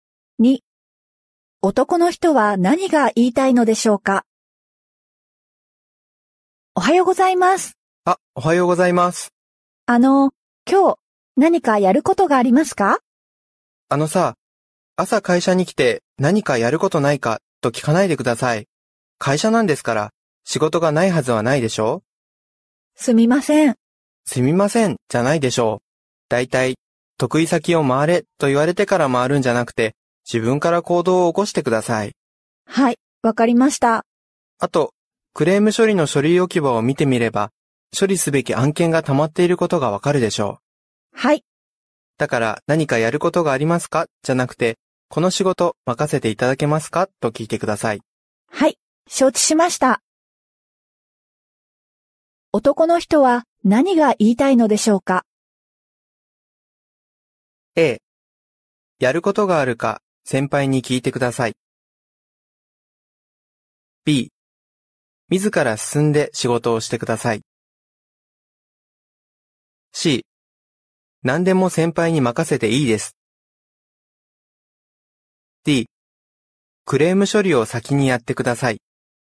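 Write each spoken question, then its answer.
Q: 男の人は何が言いたいのでしょうか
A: B: 自ら進んで仕事をしてください。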